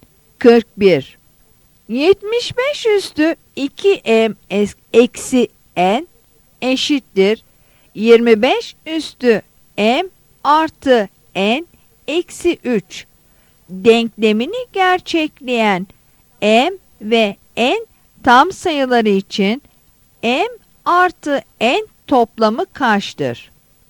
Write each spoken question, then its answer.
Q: 75 üstü 2m eksi n eşittir 25 üstü m artı n eksi 3 denklemini gerçekleyen m ve n tam sayıları için m artı n toplamı kaçtır?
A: Yanıt E'dir.